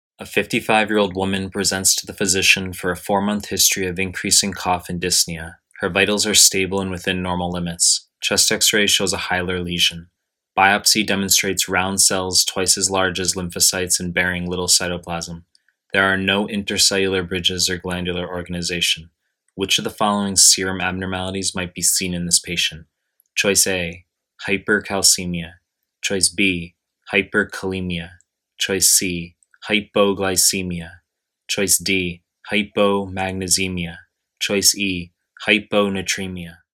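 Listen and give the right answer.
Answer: E: hyponatremia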